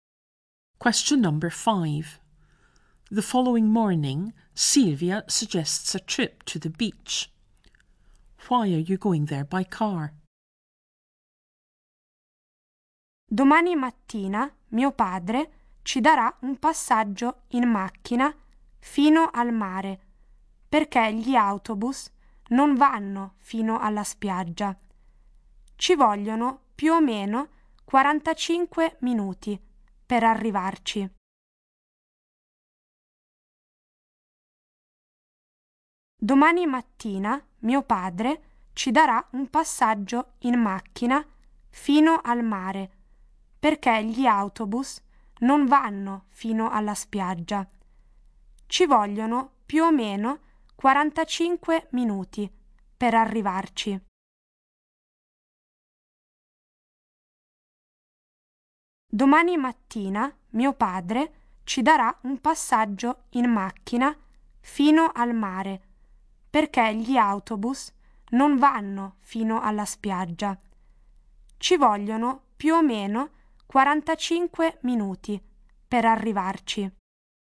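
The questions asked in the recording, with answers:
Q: Why are you going there by car?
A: Buses don't go to the beach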